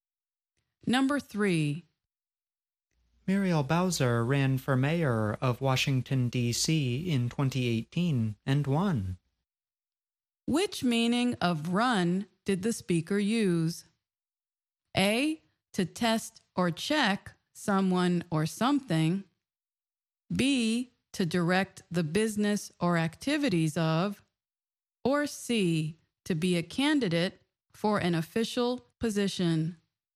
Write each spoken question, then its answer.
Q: Which meaning of run did the speaker use?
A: The answer is C, to be a candidate for an official position.